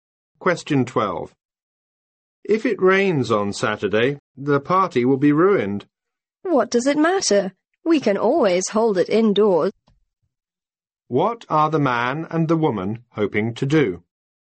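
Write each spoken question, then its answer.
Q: What are the man and the woman hoping to do?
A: Hold a party on Saturday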